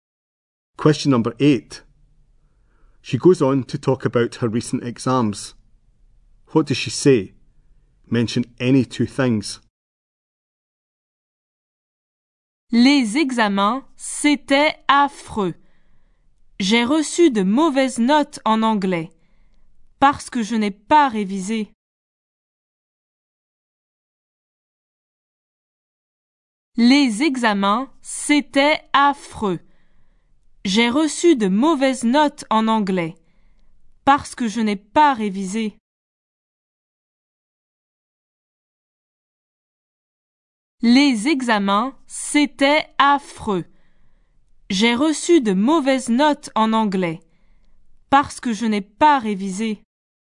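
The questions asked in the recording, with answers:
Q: What does she say? Mention any 2 things.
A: The exams were awful; she got bad marks in English because she didn't revise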